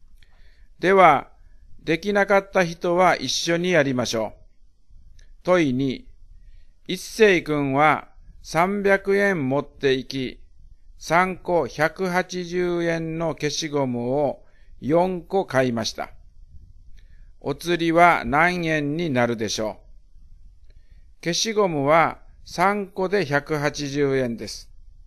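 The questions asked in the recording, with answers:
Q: お釣りは何円になるでしょう?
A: 60円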